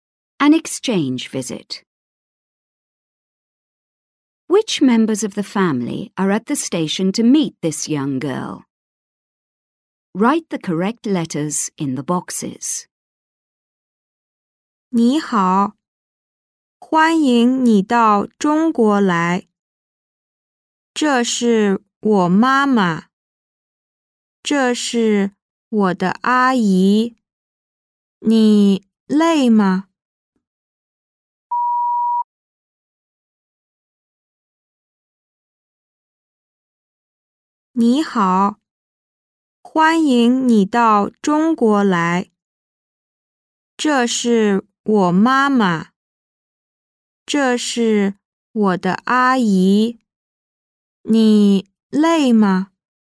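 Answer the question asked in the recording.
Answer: Her mother and her aunt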